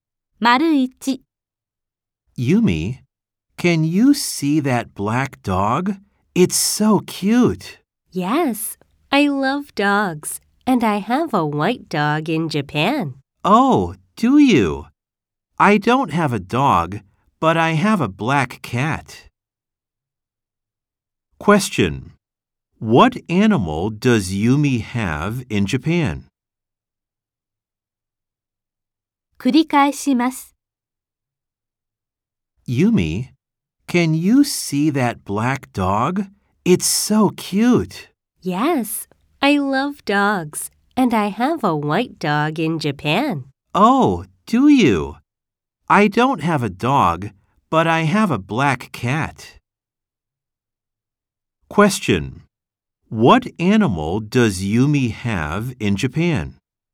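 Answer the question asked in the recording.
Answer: A white dog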